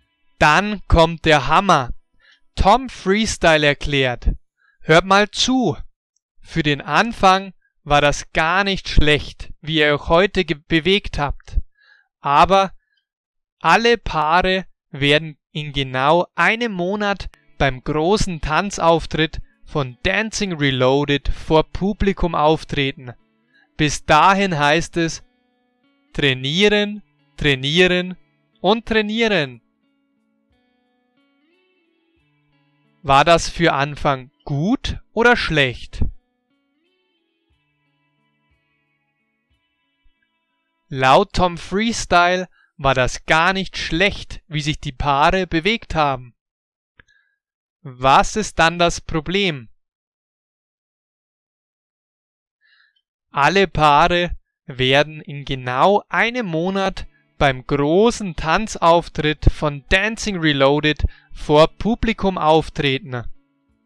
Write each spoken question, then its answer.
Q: War das für Anfang gut oder schlecht?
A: Laut Tom Freestyle war das gar nicht schlecht, wie sich die Paare bewegt haben.

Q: Was ist dann das Problem?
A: Alle Paare werden in genau einem Monat beim großen Tanzauftritt von Dancing Reloaded vor Publikum auftreten.